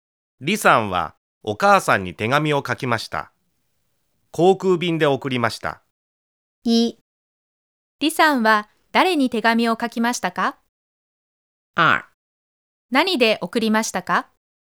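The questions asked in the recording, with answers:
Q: 李さんは誰に手紙を書きましたか?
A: お母さん

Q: 何で送りましたか?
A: 航空便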